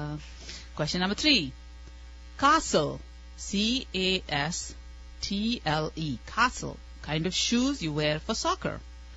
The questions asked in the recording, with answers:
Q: C-A-S. T-L-E, castle, kind of shoes you wear for soccer.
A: Cleats.